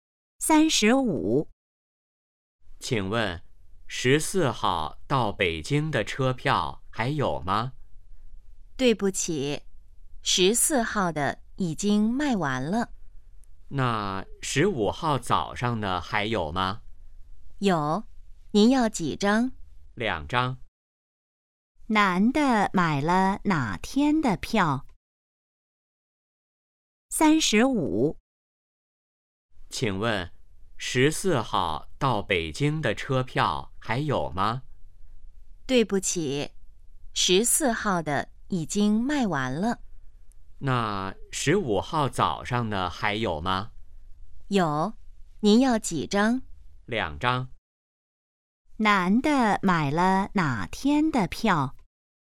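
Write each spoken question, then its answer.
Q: 男的买了哪天的票?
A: 15号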